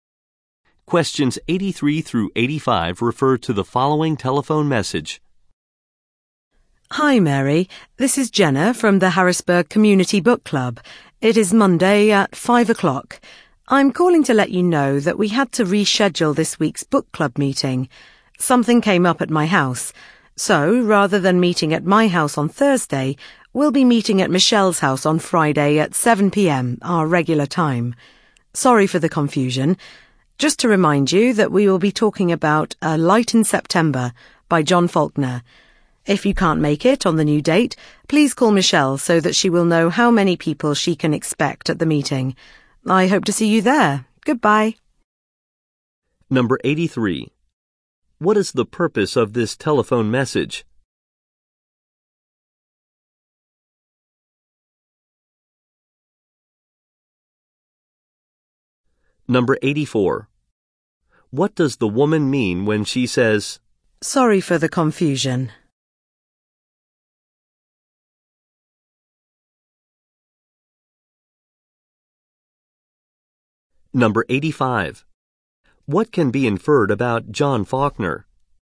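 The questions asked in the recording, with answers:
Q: What is the purpose of this telephone message?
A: To say the book club meeting has been rescheduled

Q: What can be inferred about John Faulkner?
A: He wrote A Light in September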